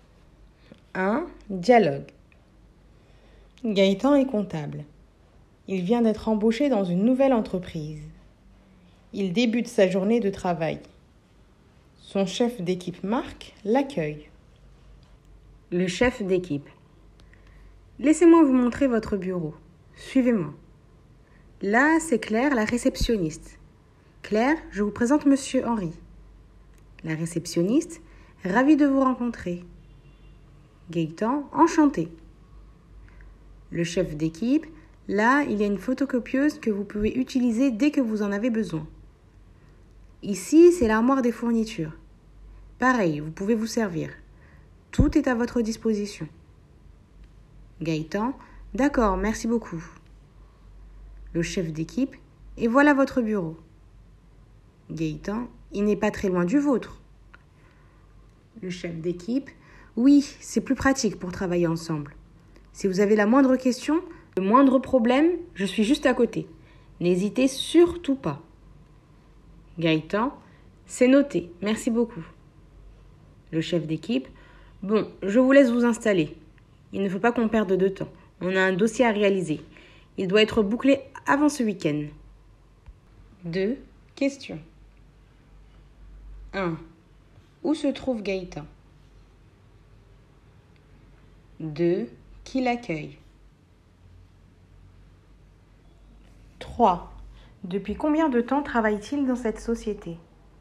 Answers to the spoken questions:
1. Dans la nouvelle entreprise dans laquelle il travaille.
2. Son chef d'équipe.
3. C'est son premier jour.